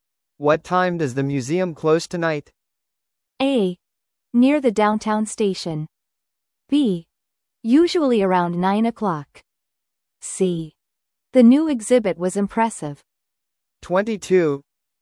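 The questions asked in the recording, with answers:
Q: What time does the museum close tonight?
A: B: Usually around 9 o'clock.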